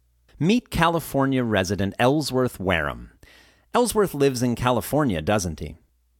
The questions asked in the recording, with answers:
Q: Ellsworth lives in California, doesn't he?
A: Yes, he lives in California.